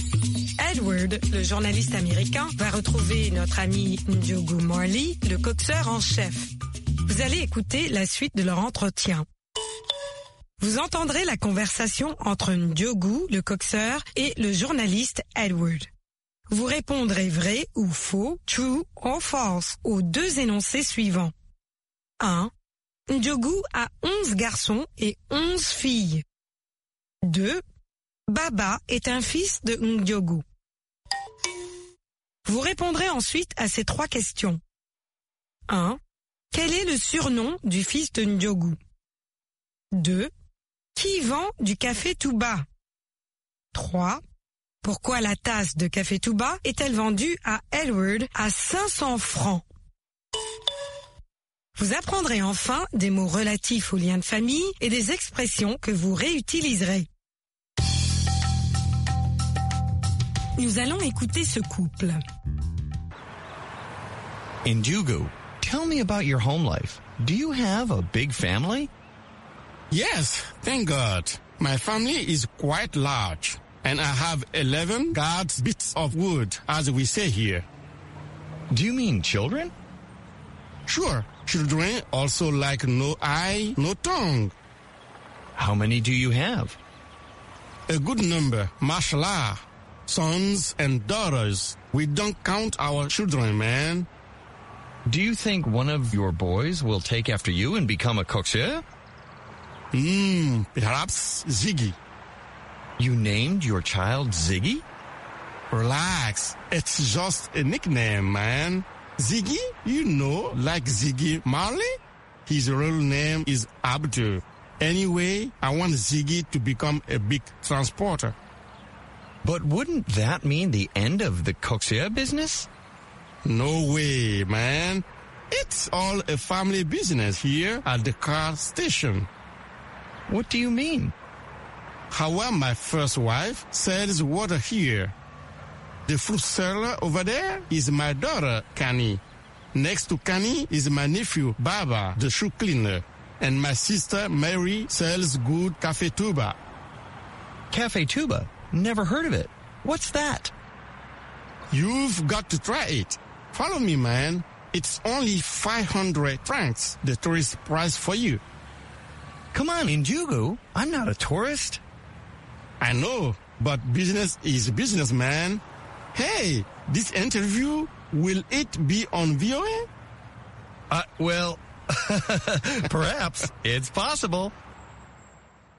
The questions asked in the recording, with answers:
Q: Ndiogou a 11 garçons et 11 filles.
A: L'énoncé 1 est faux.

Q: Baba est un fils de Ndiogou.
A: L'énoncé 2 est faux.

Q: Quel est le surnom du fils de Ndiogou?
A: Ziggy.

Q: Qui vend du café Touba?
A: Marie, la sœur de Ndiogou.

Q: Pourquoi la tasse de café Touba est-elle vendue à Edward à 500 francs?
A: C'est le prix pour touristes.